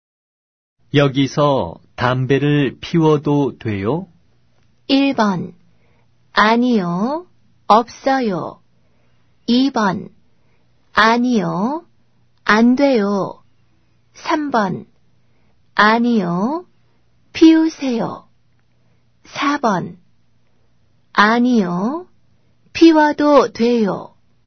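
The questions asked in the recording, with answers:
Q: 여기서 담배를 피워도 돼요?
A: 2: 아니요, 안 돼요.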